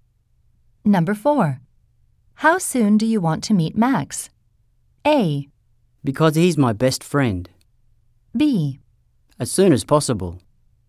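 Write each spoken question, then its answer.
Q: How soon do you want to meet Max?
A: B: As soon as possible.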